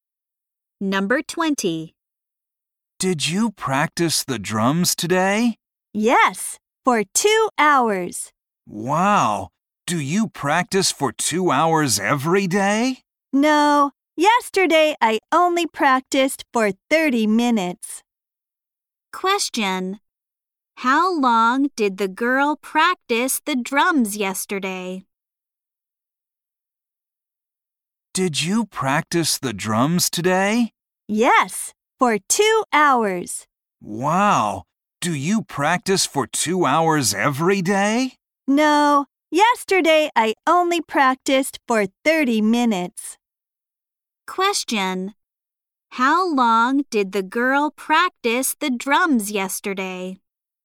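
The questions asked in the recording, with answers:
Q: How long did the girl practice the drums yesterday?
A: 30 minutes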